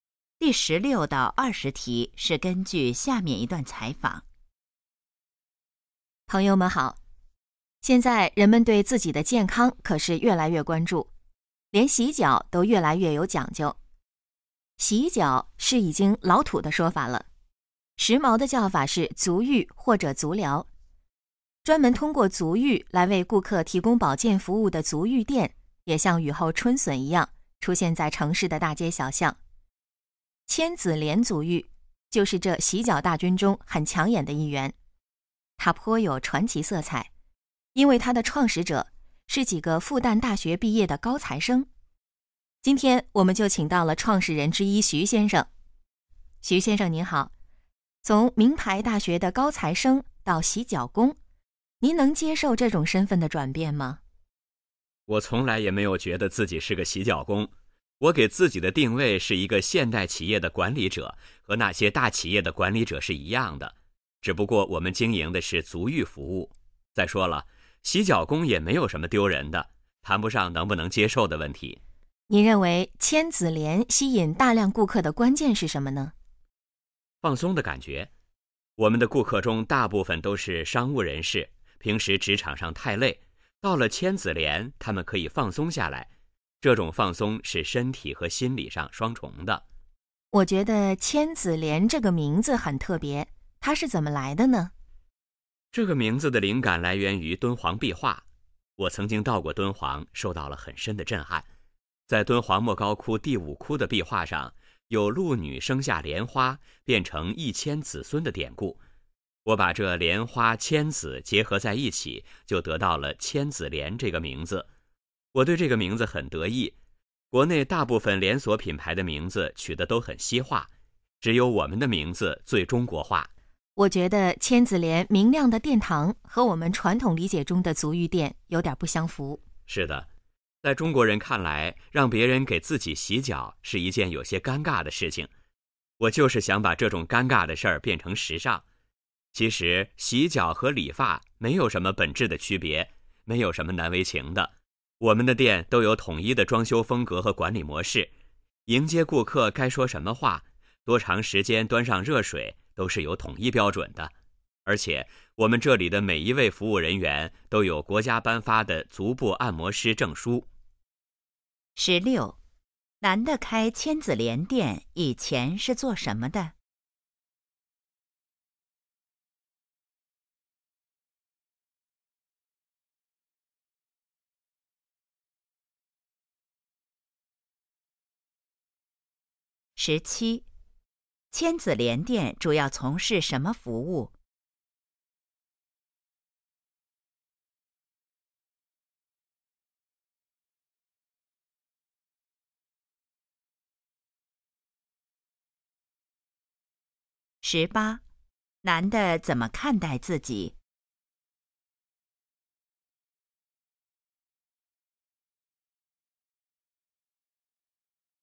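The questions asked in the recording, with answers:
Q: 男的开千子莲店以前是做什么的?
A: 复旦大学毕业的高材生(学生)

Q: 千子莲店主要从事什么服务?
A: 足浴服务

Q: 男的怎么看待自己?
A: 现代企业的管理者

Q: 千子莲这个名字来自什么?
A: 敦煌壁画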